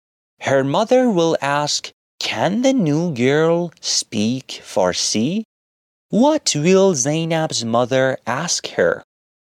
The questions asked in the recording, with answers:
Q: What will Zainab's mother ask her?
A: Great, she will ask, can the new girl speak Farsi?